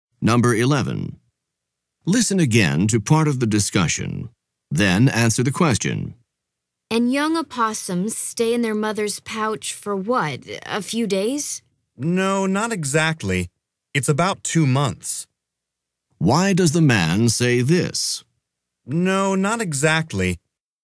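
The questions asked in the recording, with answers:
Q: Why does the man say this?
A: To correct the mistaken guess: young opossums stay in the pouch about 2 months, not a few days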